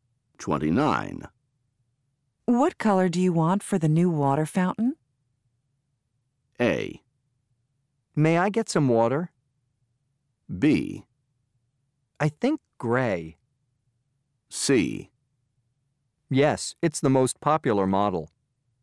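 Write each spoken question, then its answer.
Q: What color do you want for the new water fountain?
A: B: I think gray.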